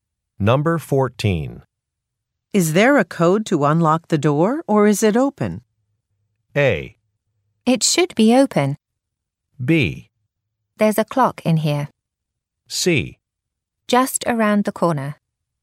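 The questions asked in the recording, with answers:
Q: Is there a code to unlock the door, or is it open?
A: A: It should be open.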